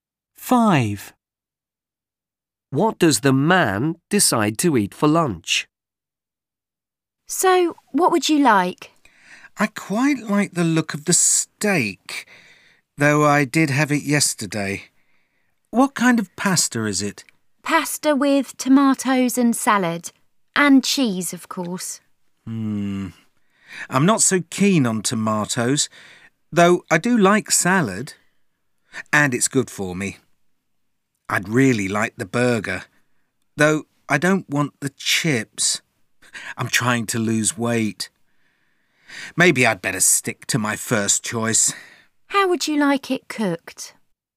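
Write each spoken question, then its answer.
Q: What does the man decide to eat for lunch?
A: the steak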